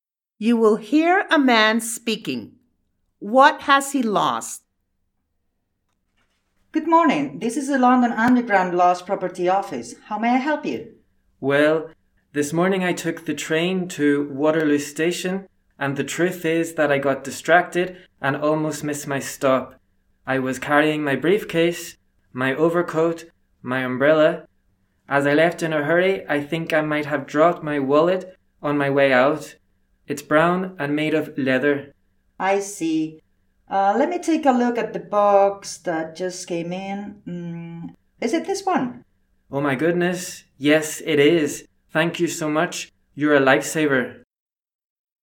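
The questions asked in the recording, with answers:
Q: What has he lost?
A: His wallet (brown leather)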